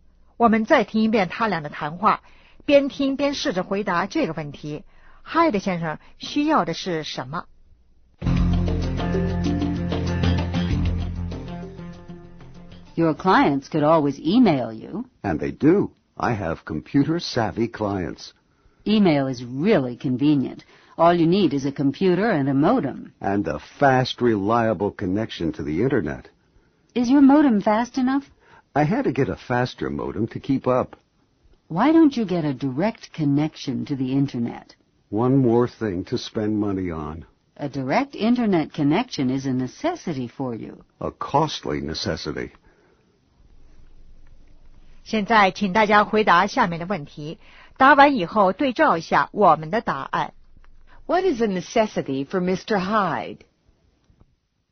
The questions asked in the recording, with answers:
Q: What is a necessity for Mr. Hyde?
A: A direct Internet connection is a necessity.